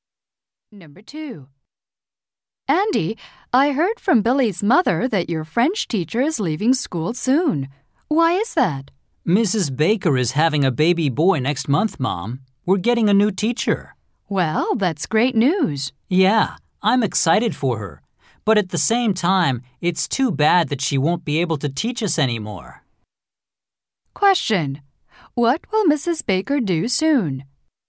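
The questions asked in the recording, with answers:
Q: What will Mrs. Baker do soon?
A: Have a baby boy and leave the school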